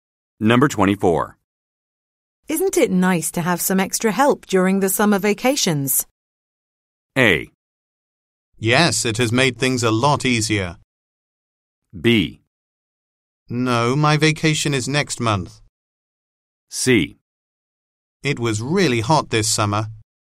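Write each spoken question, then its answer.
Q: Isn't it nice to have some extra help during the summer vacations?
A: A: Yes, it has made things a lot easier.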